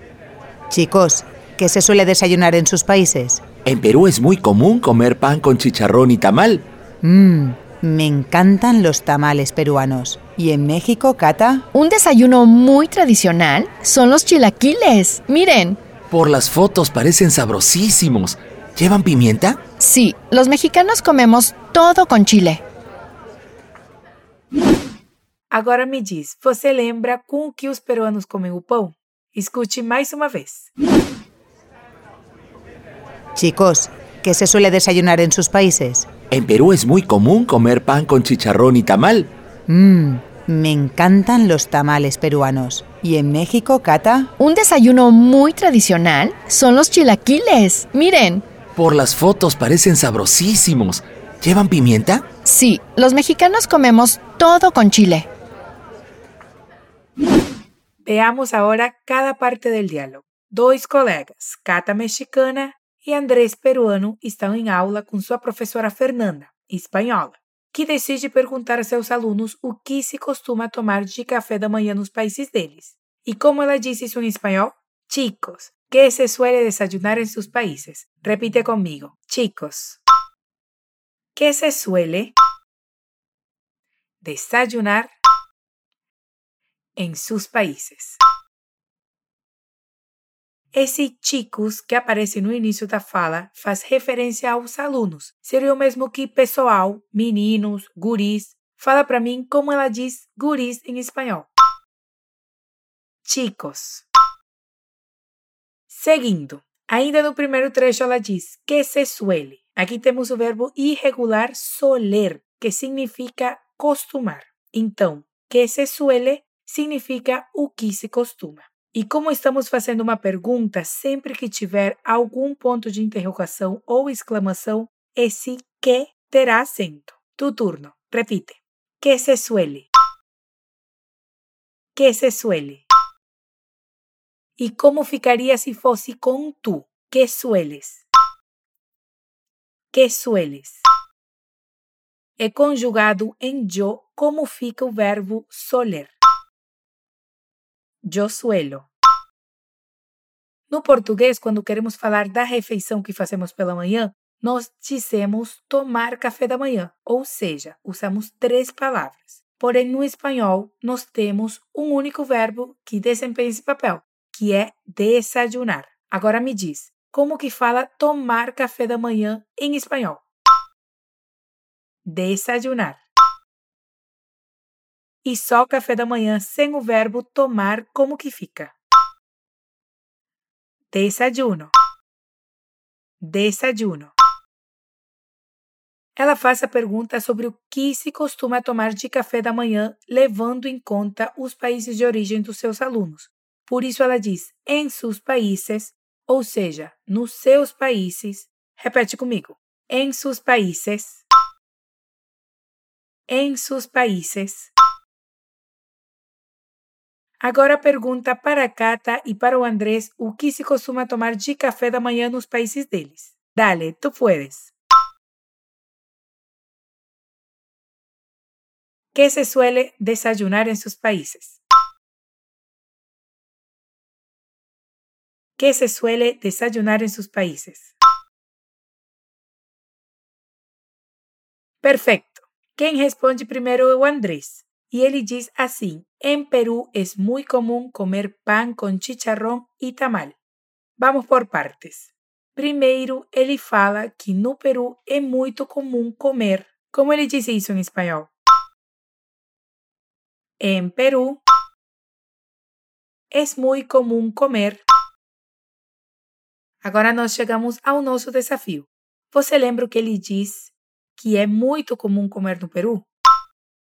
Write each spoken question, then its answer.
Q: Você lembra o que ele diz que é muito comum comer no Peru?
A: Te ayudo. Pan con chicharrón y tamal.